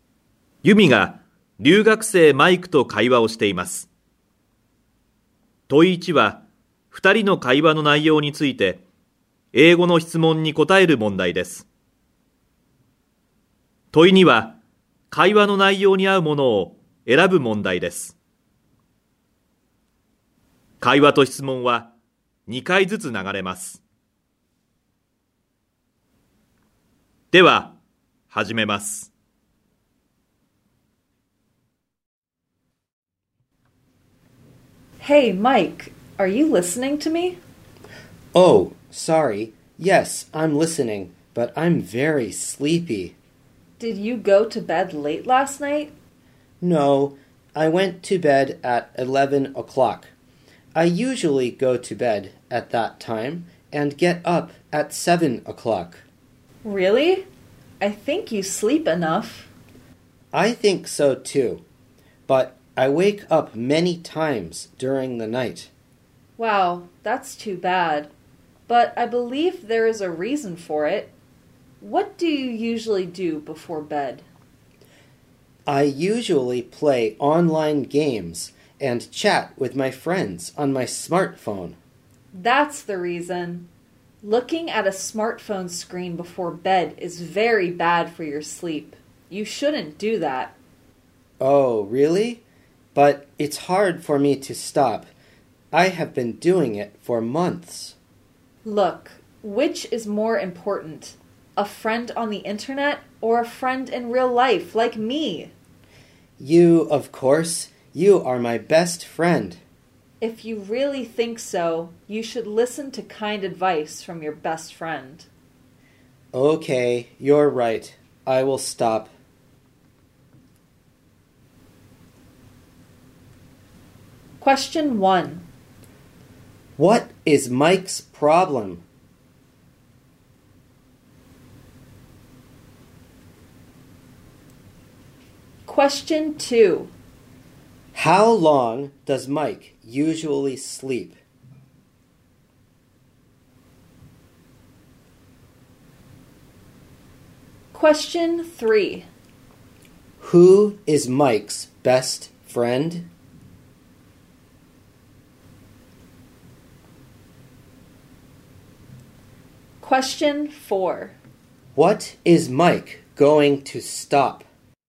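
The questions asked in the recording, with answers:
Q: What is Mike's problem?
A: He wakes up many times during the night and is sleepy.

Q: How long does Mike usually sleep?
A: Eight hours.

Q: Who is Mike's best friend?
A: Yumi.

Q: What is Mike going to stop?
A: Playing online games and chatting on his smartphone before bed.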